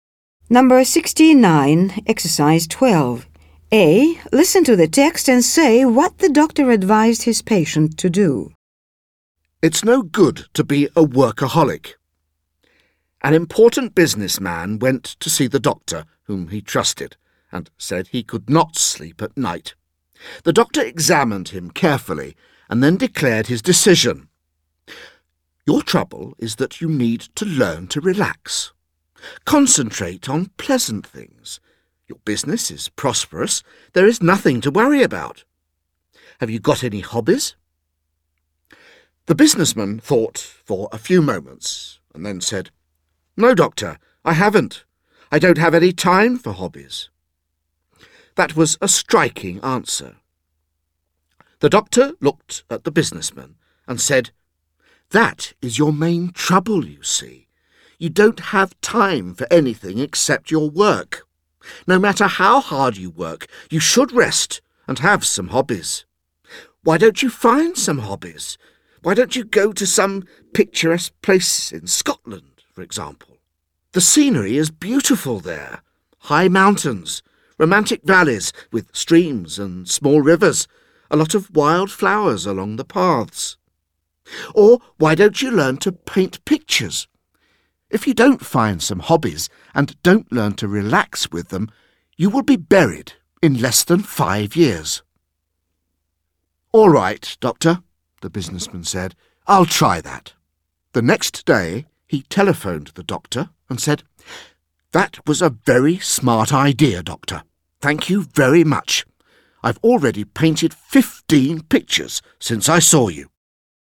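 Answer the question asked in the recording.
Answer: To relax and find some hobbies, e.g. travel to Scotland or learn to paint pictures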